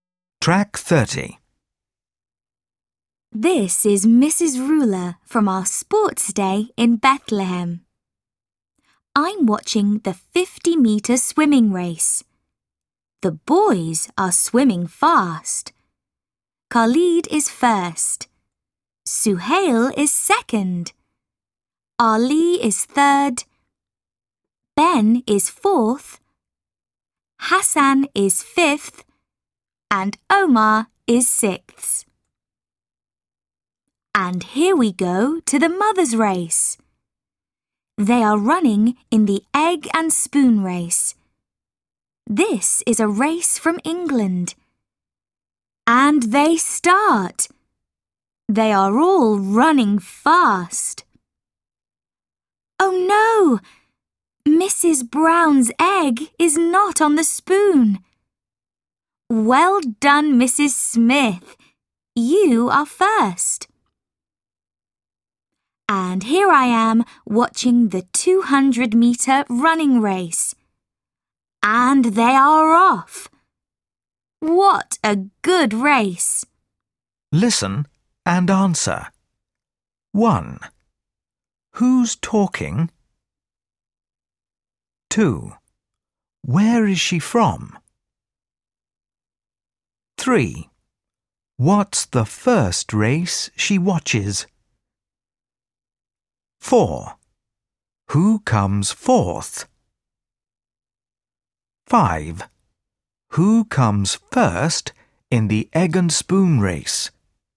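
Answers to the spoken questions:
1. Mrs. Ruler
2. Bethlehem
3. the 50-meter swimming race
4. Ben
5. Mrs. Smith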